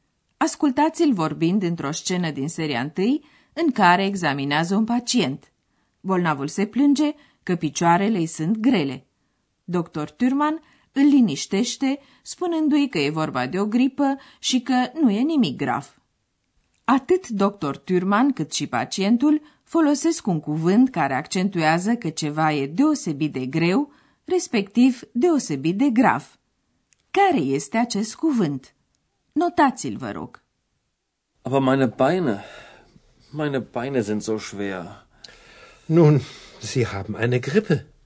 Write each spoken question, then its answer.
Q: Care este acest cuvânt?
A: Ultimul cuvânt căutat era zo, așa.